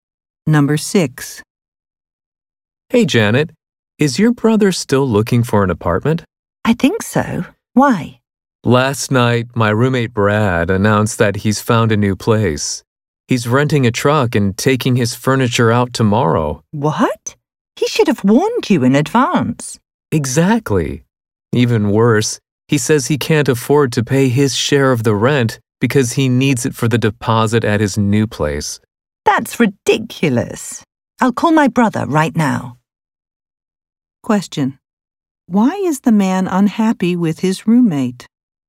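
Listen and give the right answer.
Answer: The roommate is moving out without warning and won't pay his share of the rent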